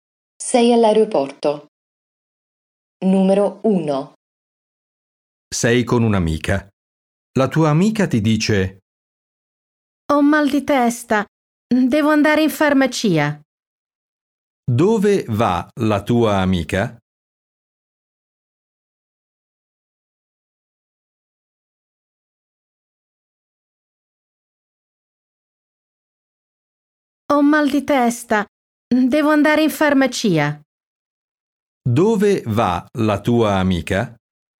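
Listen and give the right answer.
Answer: In farmacia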